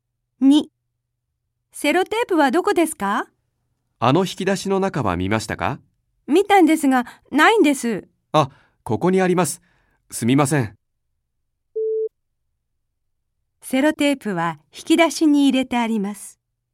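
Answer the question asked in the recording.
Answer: ×(正しくない)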